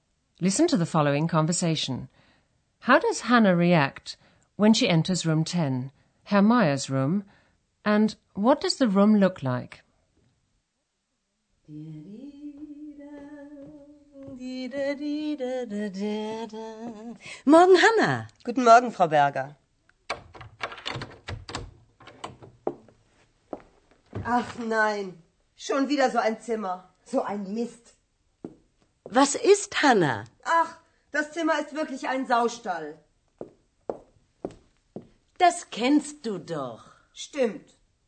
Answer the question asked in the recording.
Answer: Hannah is furious when she sees the state of Herr Meyer's room.